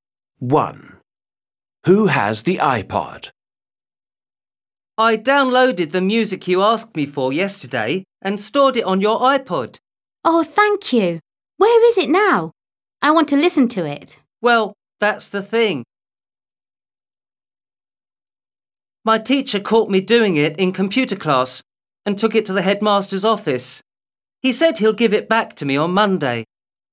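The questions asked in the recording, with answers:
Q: Who has the iPod?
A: The headmaster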